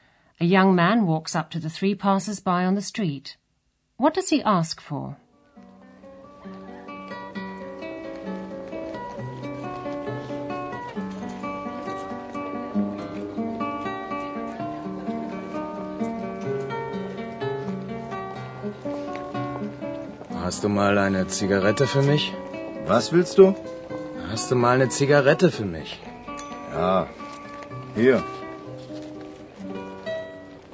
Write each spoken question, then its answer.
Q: What does he ask for?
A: The young man asks them for a cigarette.